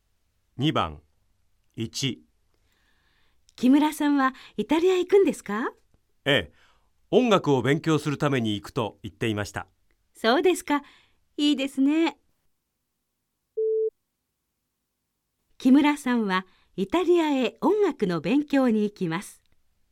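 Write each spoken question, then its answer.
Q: 木村さんはイタリアへ音楽の勉強に行きます。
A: ○(正しい)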